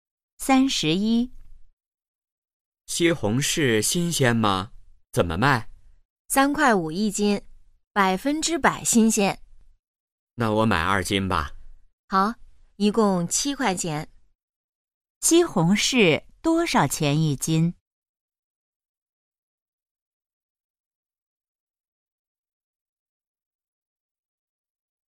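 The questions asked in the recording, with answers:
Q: 西红柿多少钱一斤?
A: 三块五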